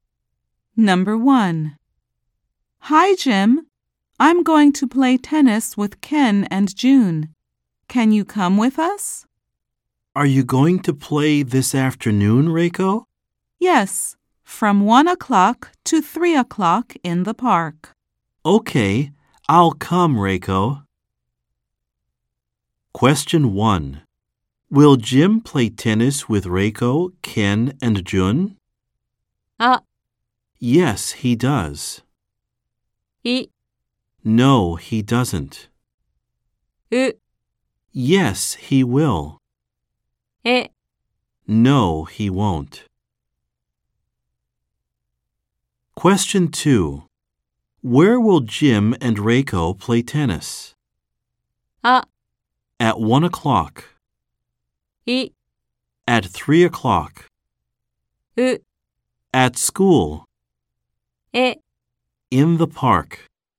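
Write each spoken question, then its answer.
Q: Will Jim play tennis with Reiko, Ken, and June?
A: う: Yes, he will.

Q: Where will Jim and Reiko play tennis?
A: え: In the park.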